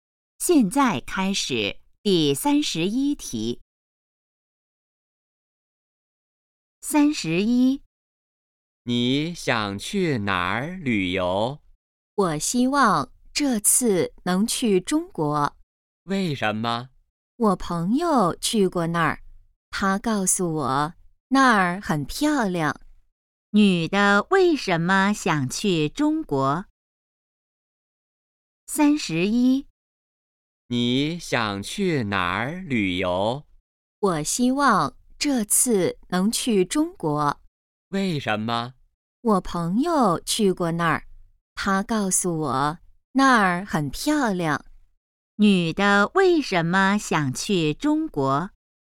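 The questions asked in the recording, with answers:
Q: 女的为什么想去中国?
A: 朋友说那儿很漂亮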